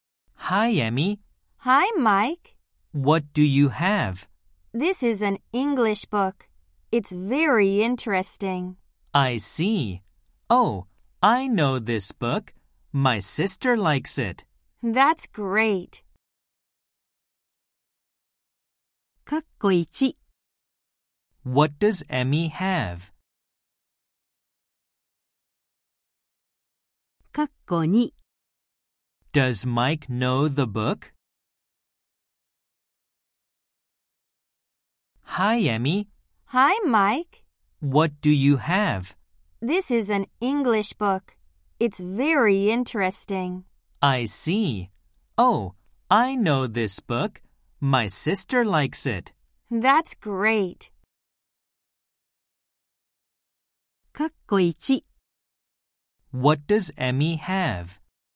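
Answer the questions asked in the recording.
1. An English book.
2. Yes, he does.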